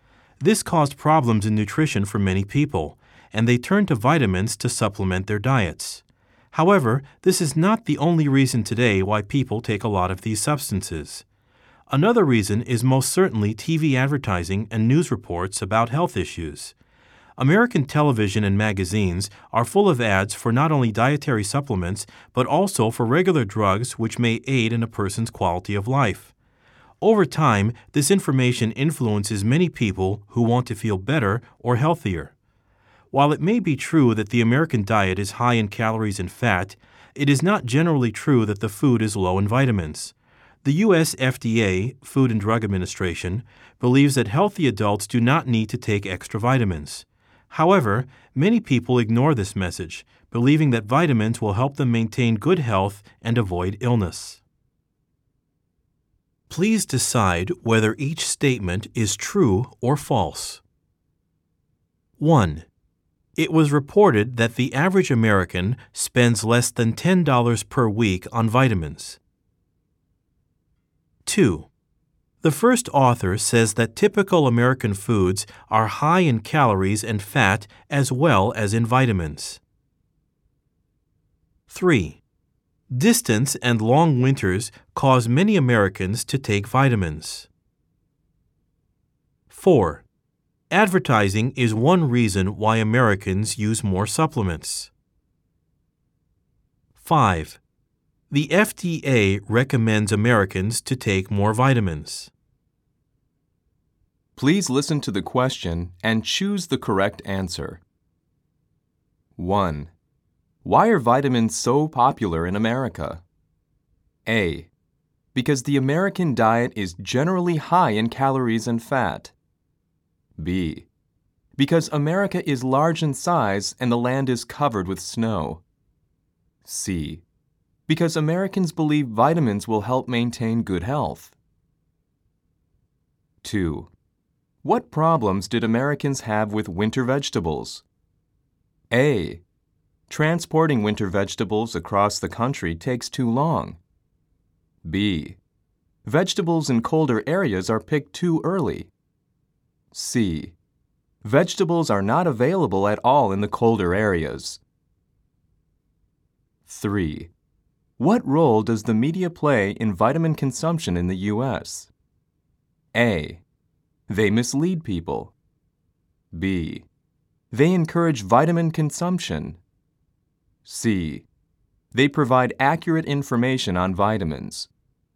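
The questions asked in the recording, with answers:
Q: Why are vitamins so popular in America?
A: C: Because Americans believe vitamins will help maintain good health.

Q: What role does the media play in vitamin consumption in the U.S.?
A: B: They encourage vitamin consumption.

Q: Advertising is one reason why Americans use more supplements.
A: True

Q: The FDA recommends Americans to take more vitamins.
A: False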